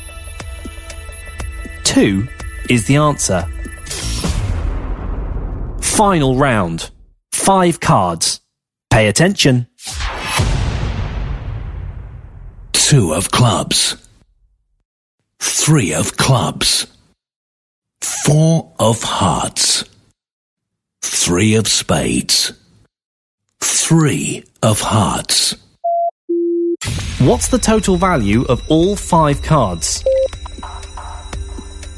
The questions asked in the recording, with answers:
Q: What's the total value of all five cards?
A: 15 is the answer.